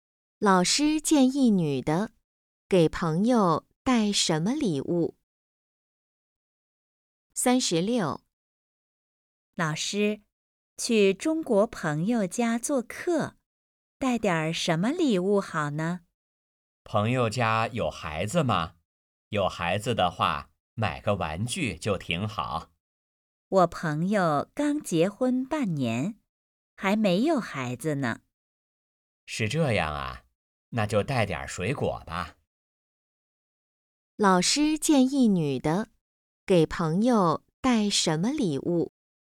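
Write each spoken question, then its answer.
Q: 老师建议女的给朋友带什么礼物?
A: 水果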